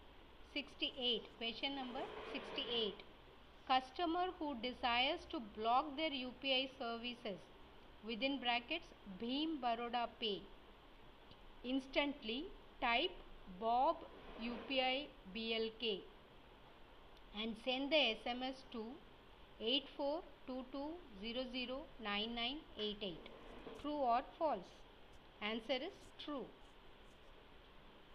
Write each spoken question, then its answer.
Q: customer who desires to block their UPI services within brackets Bhim Baroda Pay instantly type Bob UPI BLK and send the SMS to 8422009988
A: answer is true